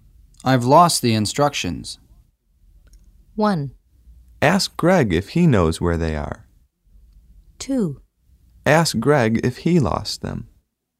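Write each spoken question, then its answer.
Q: I've lost the instructions.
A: 1: Ask Greg if he knows where they are.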